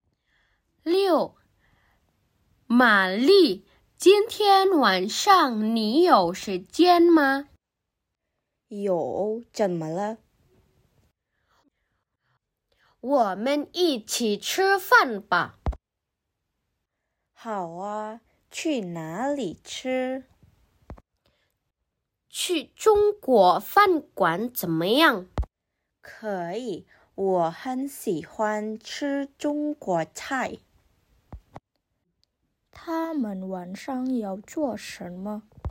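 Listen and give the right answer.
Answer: 一起去中国饭馆吃饭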